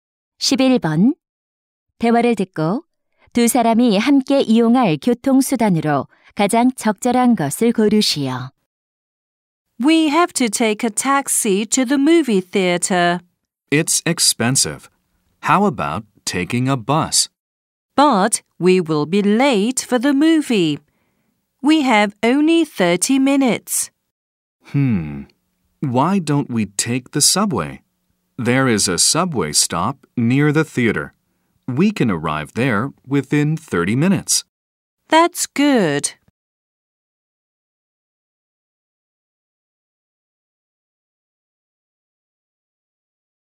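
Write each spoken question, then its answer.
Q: 대화를 듣고 두 사람이 함께 이용할 교통수단으로 가장 적절한 것을 고르시오.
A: 지하철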